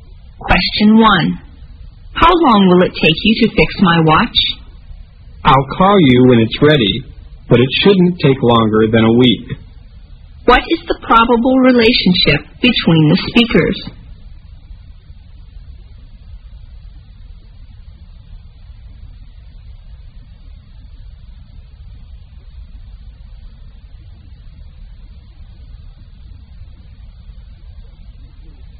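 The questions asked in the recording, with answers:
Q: What is the probable relationship between the speakers?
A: Customer and watch repairer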